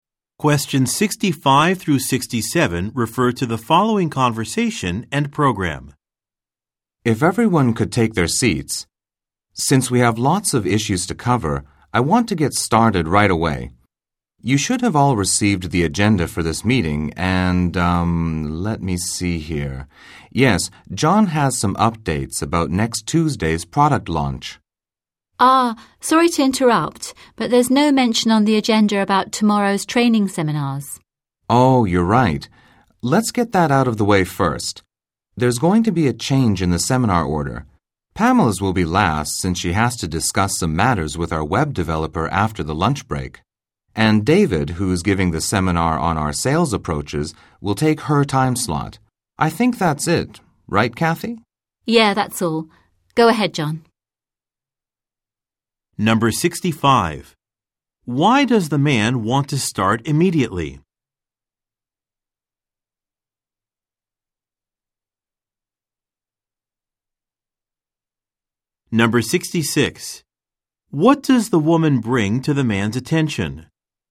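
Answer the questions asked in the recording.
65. Because there are lots of issues to cover
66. The agenda doesn't mention tomorrow's training seminars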